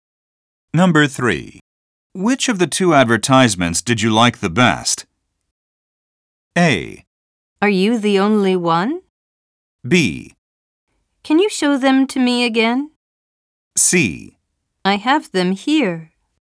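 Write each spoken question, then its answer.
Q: Which of the two advertisements did you like the best?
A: B: Can you show them to me again?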